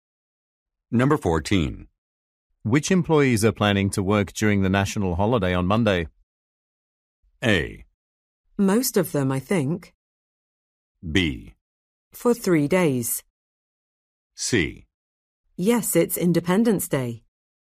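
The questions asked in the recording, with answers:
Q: Which employees are planning to work during the national holiday on Monday?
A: A: Most of them, I think.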